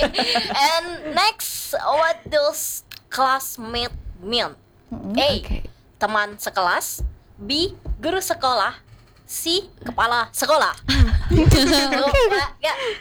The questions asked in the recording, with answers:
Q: what does classmate mean?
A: Teman sekelas.